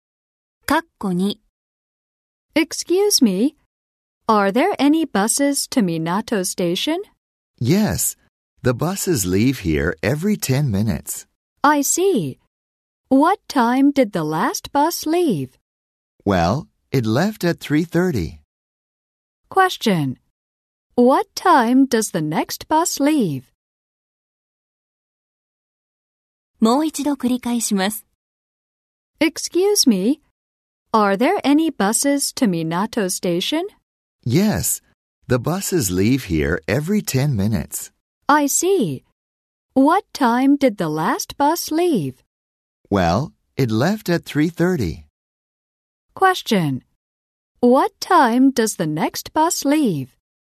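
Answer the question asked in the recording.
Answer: 3:40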